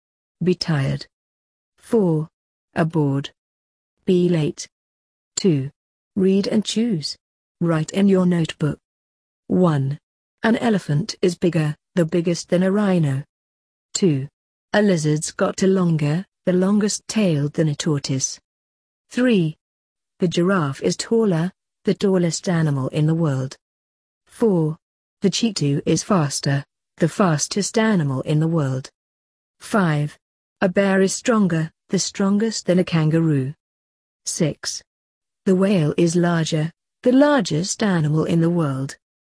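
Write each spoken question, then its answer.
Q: An elephant is bigger, the biggest than a rhino.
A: bigger

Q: A lizard's got a longer, the longest tail than a tortoise.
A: longer

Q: The giraffe is taller, the tallest animal in the world.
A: the tallest

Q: The cheetah is faster, the fastest animal in the world.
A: the fastest

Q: A bear is stronger, the strongest than a kangaroo.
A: stronger

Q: The whale is larger, the largest animal in the world.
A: the largest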